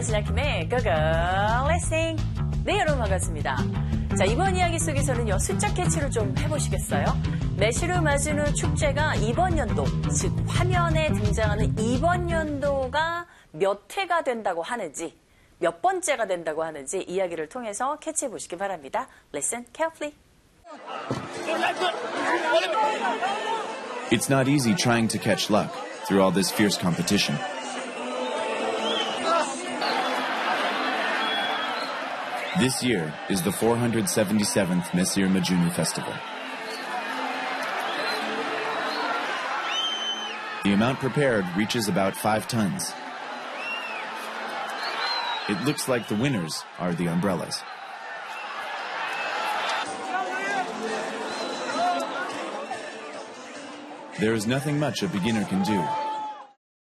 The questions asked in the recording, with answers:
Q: 매실을 맞은 후 축제가 이번 연도, 즉, 화면에 등장하는 이번 연도가 몇 회가 된다고 하는지, 몇 번째가 된다고 하는지 이야기를 통해서 캐치해보시기 바랍니다.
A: 바로 477번째 축제라고 하네요.